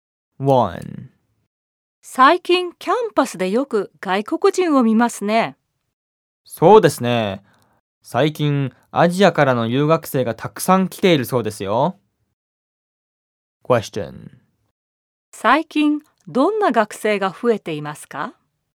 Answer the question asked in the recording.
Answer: 最近アジアからの留学生が増えているらしいです。